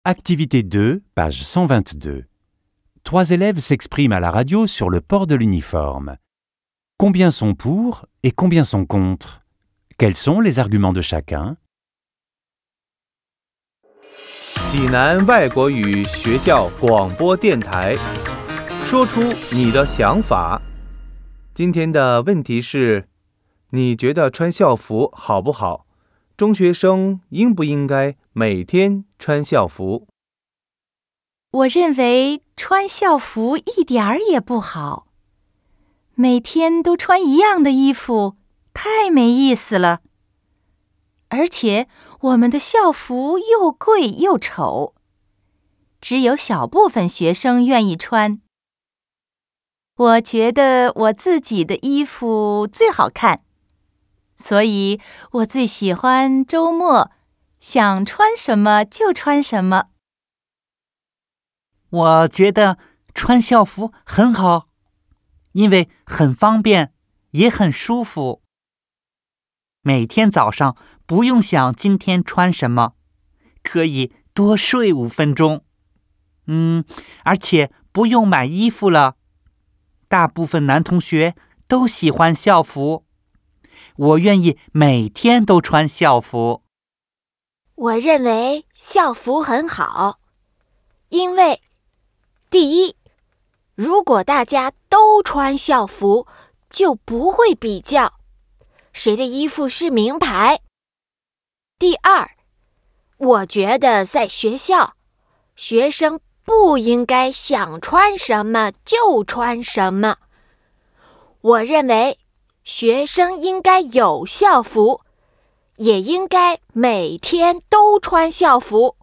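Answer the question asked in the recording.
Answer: Deux sont pour, un est contre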